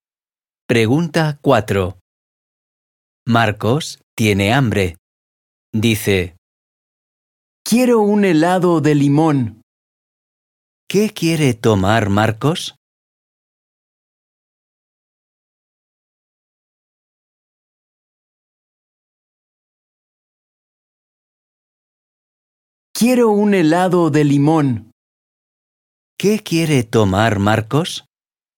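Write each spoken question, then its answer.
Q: ¿Qué quiere tomar Marcos?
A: un helado de limón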